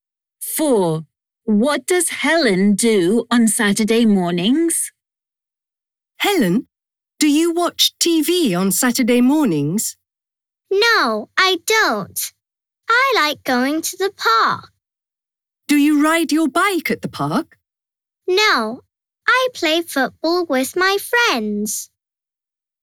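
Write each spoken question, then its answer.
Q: What does Helen do on Saturday mornings?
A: She plays football with her friends in the park.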